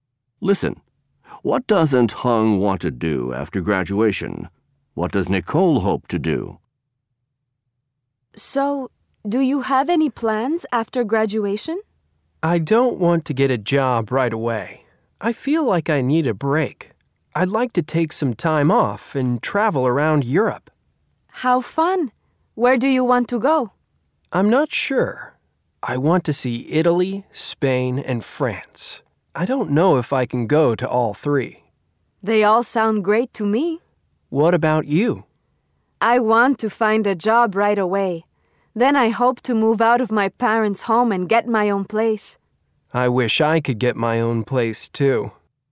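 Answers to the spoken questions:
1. Get a job right away
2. Find a job right away, then move out of her parents' home and get her own place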